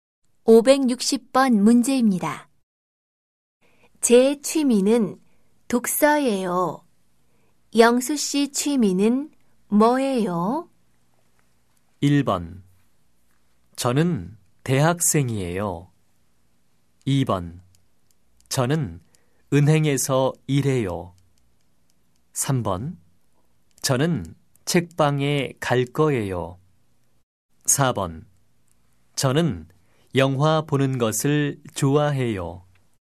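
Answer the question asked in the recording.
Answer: 4: 저는 영화 보는 것을 좋아해요.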